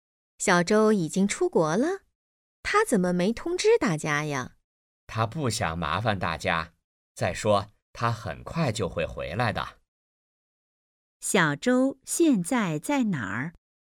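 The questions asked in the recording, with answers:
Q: 小周现在在哪儿?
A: 在国外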